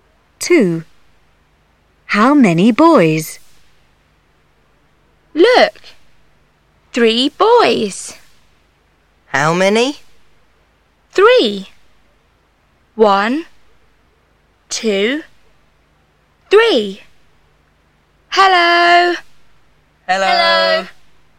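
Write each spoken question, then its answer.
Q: How many boys?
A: Three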